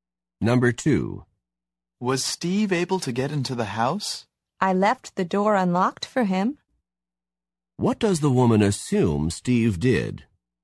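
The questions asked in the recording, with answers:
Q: What does the woman assume Steve did?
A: He got into the house through the unlocked door.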